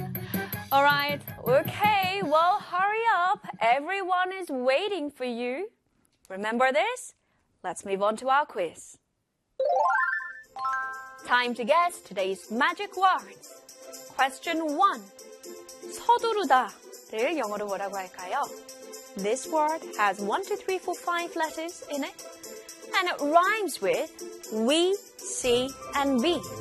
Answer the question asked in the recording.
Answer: H-U-R-R-Y, hurry.